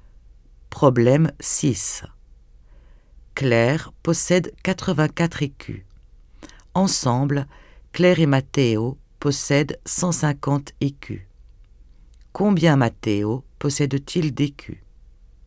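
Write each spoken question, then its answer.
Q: Combien Matteo possède-t-il d'écus?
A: 66 écus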